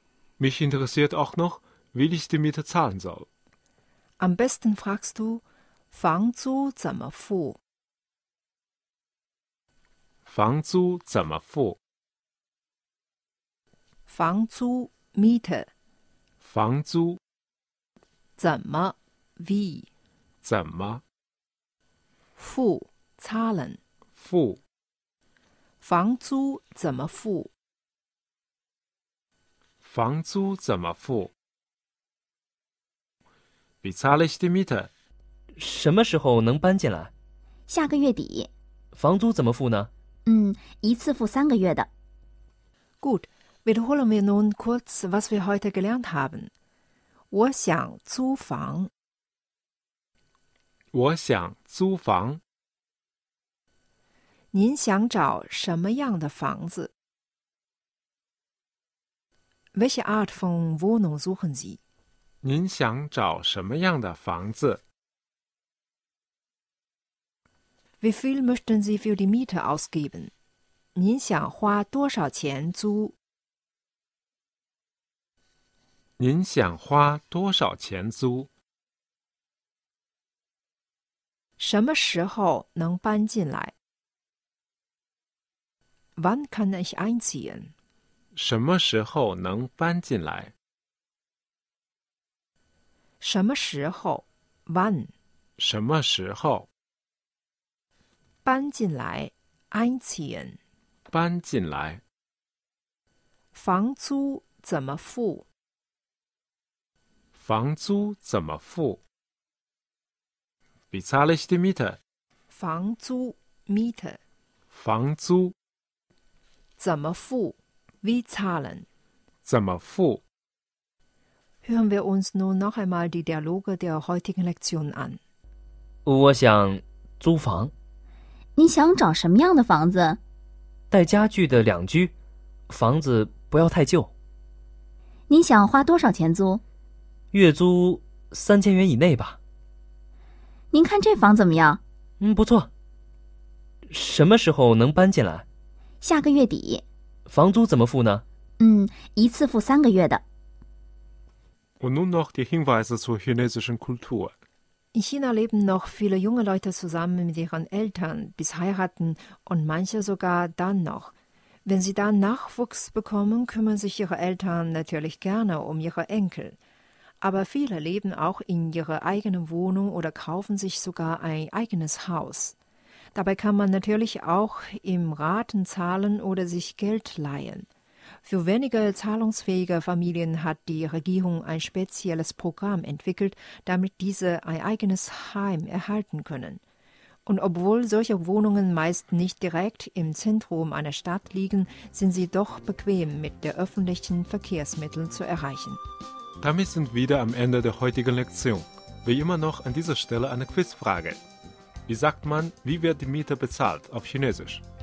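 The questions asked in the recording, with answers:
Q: Wie sagt man, wie wird die Miete bezahlt auf Chinesisch?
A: 房租怎么付?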